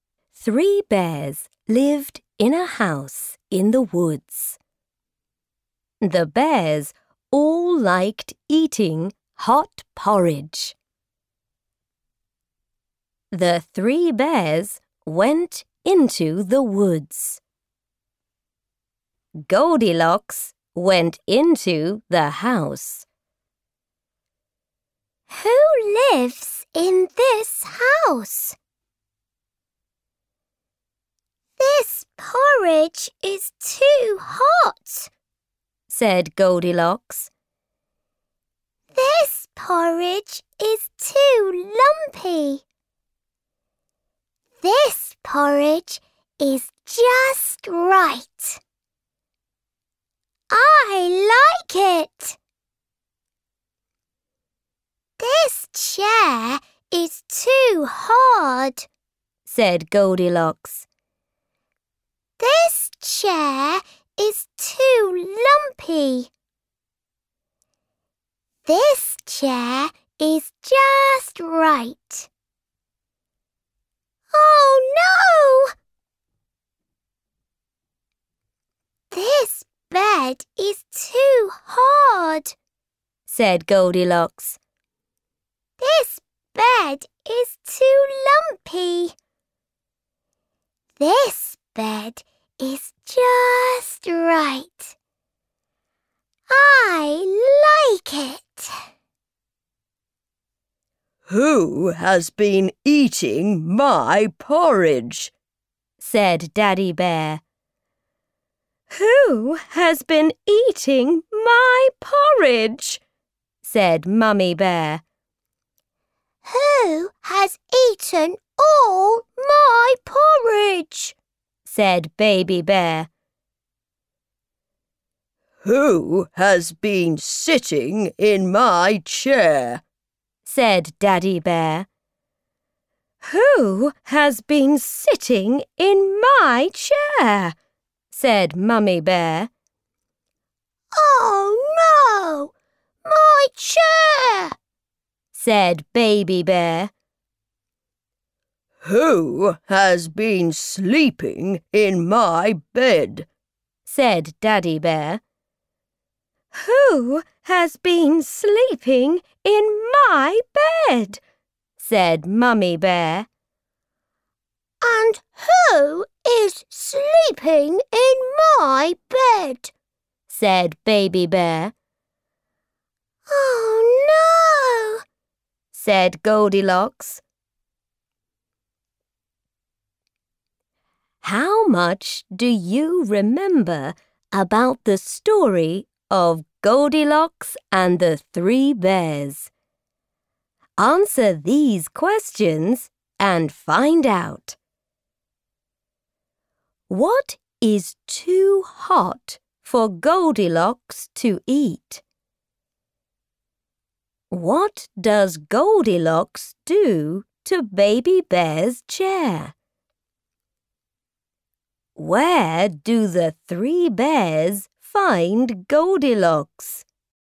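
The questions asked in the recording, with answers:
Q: What is too hot for Goldilocks to eat?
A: The porridge

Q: Where do the three bears find Goldilocks?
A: Sleeping in Baby Bear's bed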